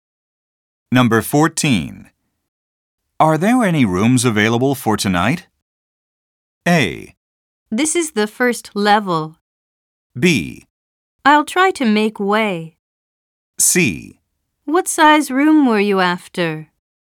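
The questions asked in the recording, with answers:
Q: Are there any rooms available for tonight?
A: C: What size room were you after?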